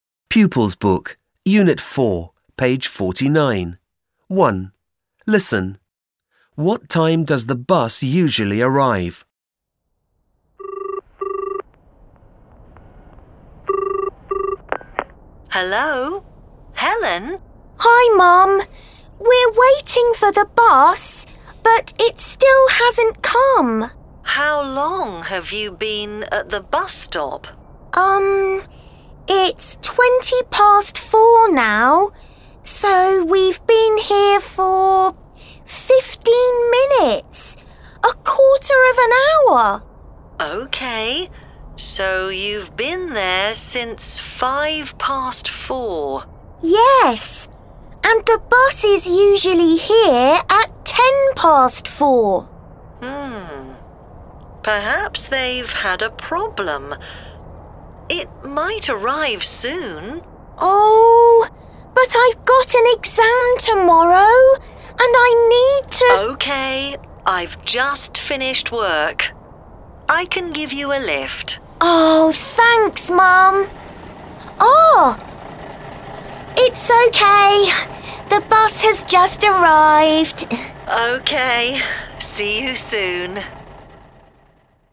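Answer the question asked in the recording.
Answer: At 4:10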